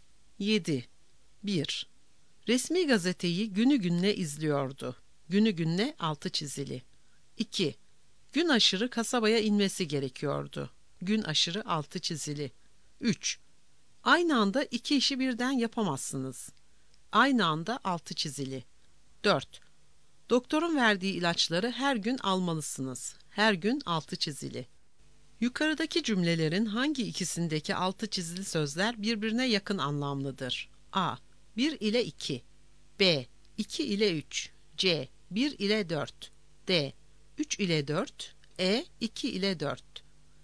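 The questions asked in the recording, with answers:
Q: Yukarıdaki cümlelerin hangi ikisindeki altı çizili sözler birbirine yakın anlamlıdır?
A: C: 1 ile 4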